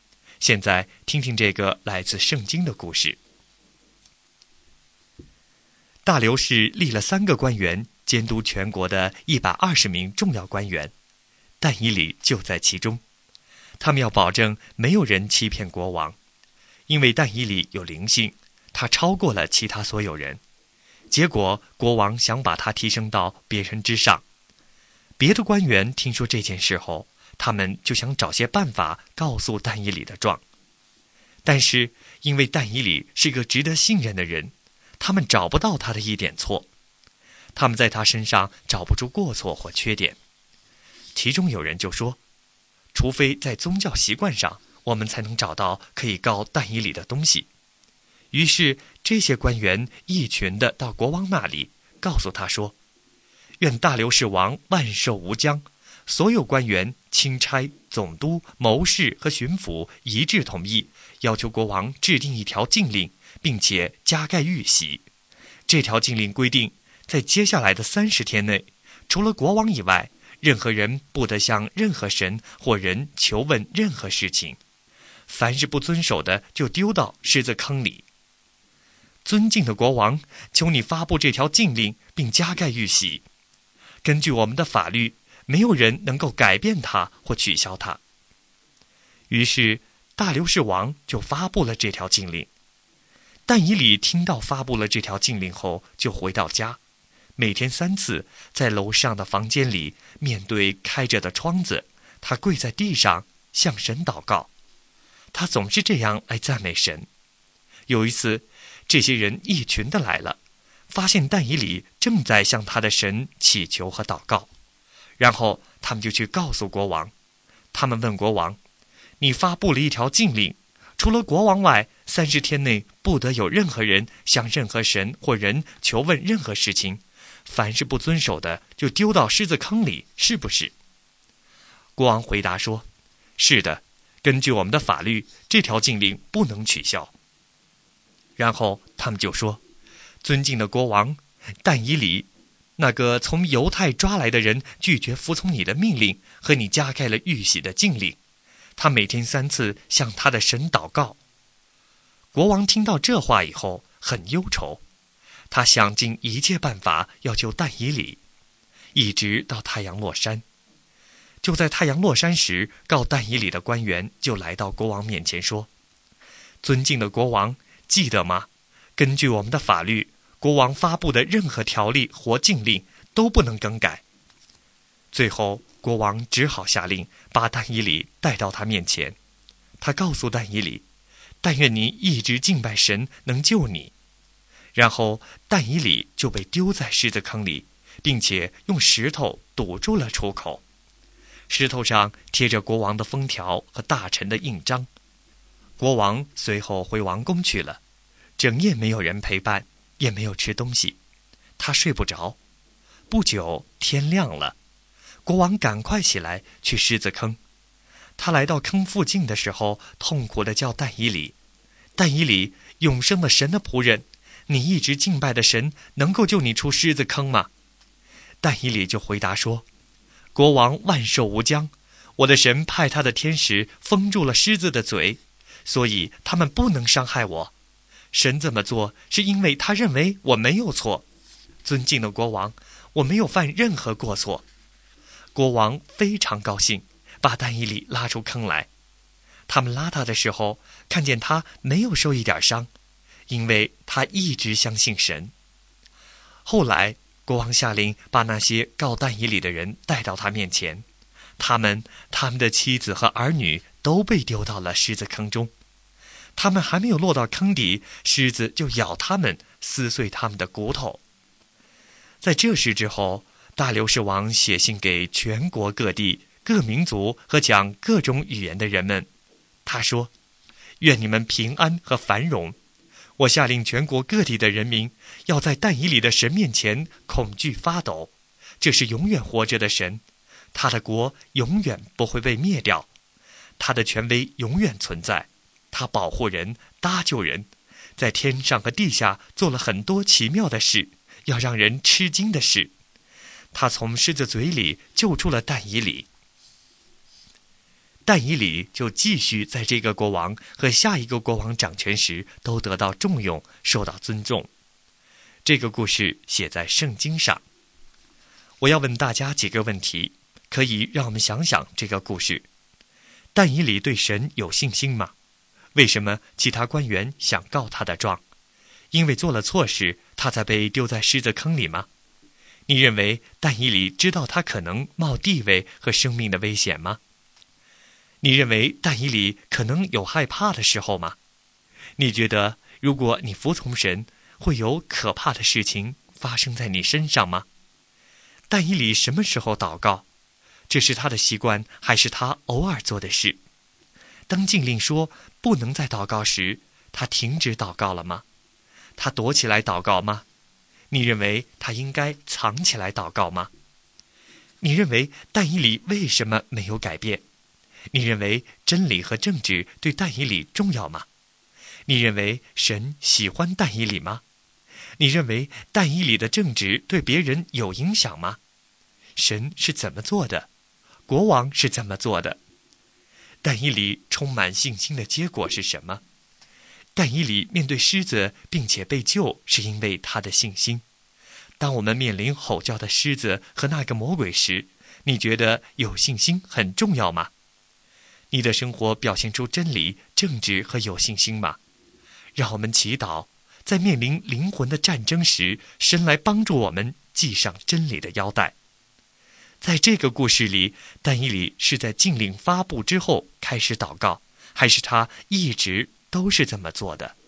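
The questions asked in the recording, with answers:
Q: 为什么其他官员想告他的状?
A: 因为国王想把他提升到别人之上

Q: 因为做了错事,他才被丢在狮子坑里吗?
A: 不是,是因为他向神祷告

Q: 但以理什么时候祷告?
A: 每天三次

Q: 这是他的习惯,还是他偶尔做的事?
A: 是他的习惯

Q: 当禁令说不能再祷告时,他停止祷告了吗?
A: 没有

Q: 他躲起来祷告吗?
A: 没有,面对开着的窗子祷告

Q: 在这个故事里,但以理是在禁令发布之后开始祷告,还是他一直都是这么做的?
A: 他一直都是这么做的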